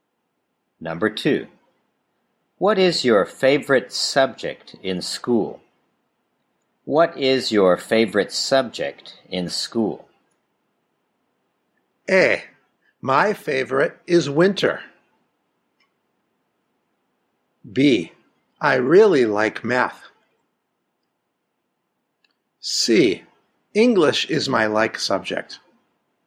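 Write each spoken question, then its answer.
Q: What is your favorite subject in school?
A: B: I really like math.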